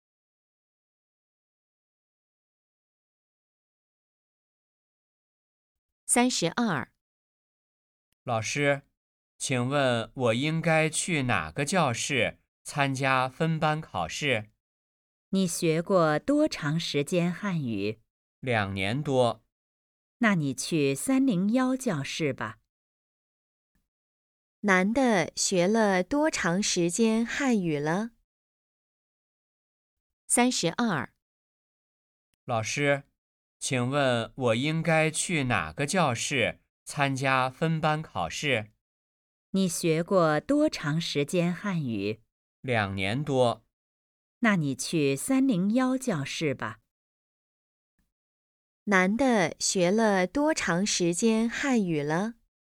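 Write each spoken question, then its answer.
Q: 男的学了多长时间汉语了?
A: 两年多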